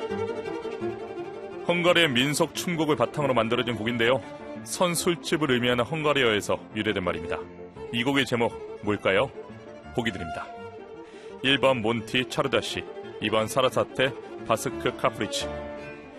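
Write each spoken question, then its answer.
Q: 이 곡의 제목 뭘까요?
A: 1: 몬티 차르다시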